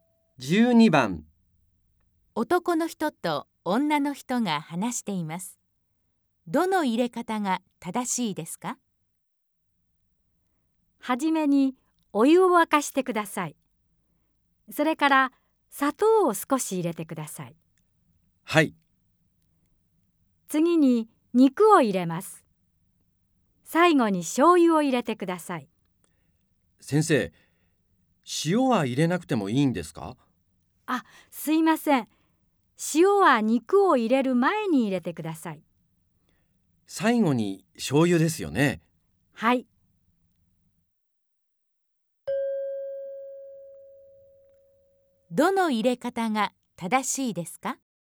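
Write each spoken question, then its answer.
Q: どの入れ方が正しいですか?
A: お湯を沸かす→砂糖→塩→肉→醤油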